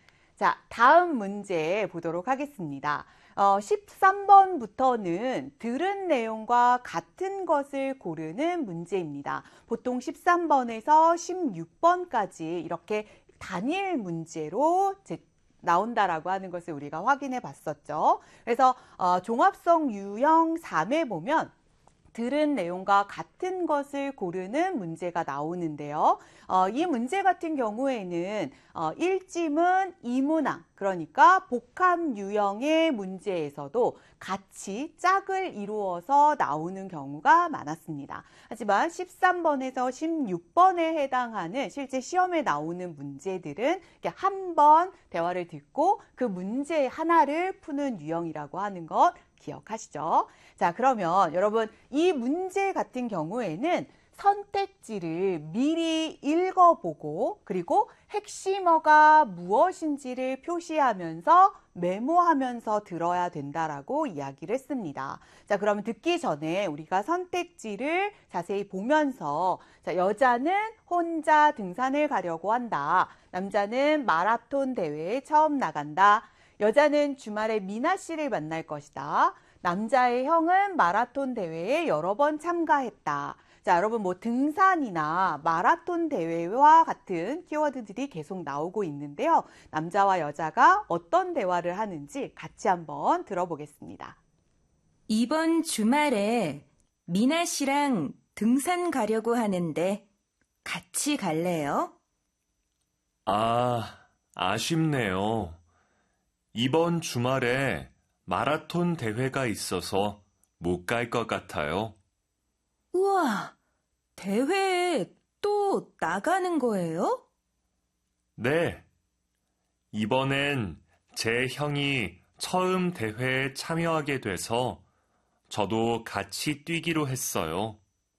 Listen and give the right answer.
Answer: 그래서 정답은 3번이 되는 것입니다.